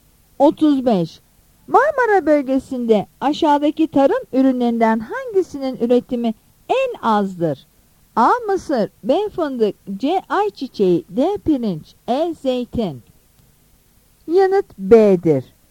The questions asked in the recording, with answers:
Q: Marmara bölgesinde aşağıdaki tarım ürünlerinden hangisinin üretimi en azdır?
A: Yanıt B'dir.